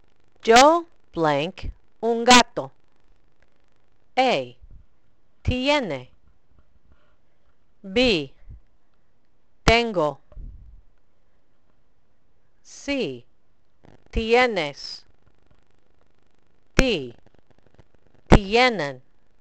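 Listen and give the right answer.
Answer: B: Tengo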